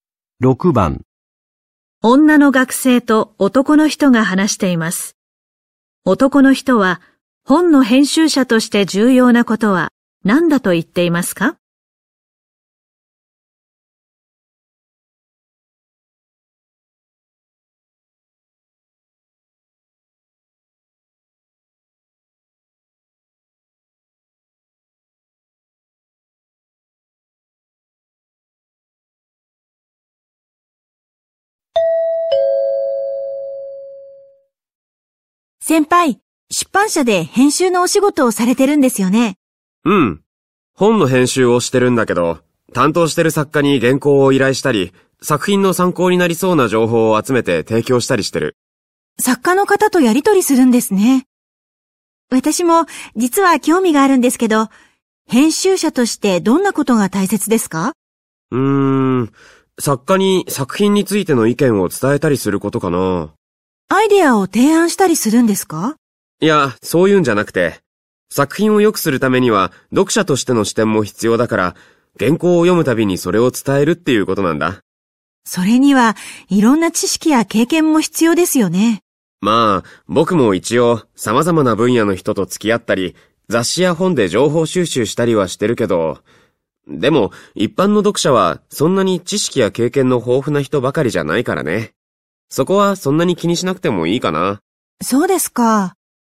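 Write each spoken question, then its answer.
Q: 男の人は本の編集者として重要なことは何だと言っていますか?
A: 読者としての視点から作品についての意見を作家に伝えること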